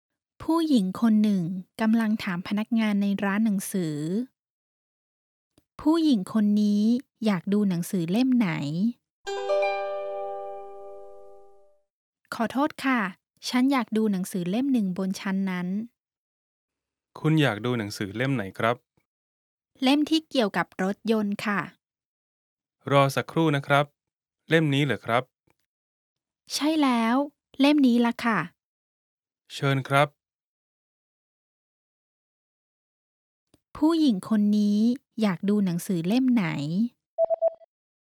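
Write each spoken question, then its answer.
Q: ผู้หญิงคนนี้อยากดูหนังสือเล่มไหน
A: เล่มที่เกี่ยวกับรถยนต์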